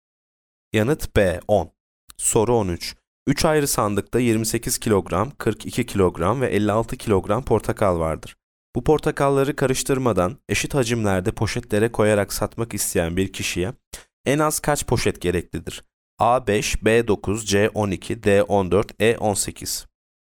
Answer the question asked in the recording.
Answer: Yanıt B 9.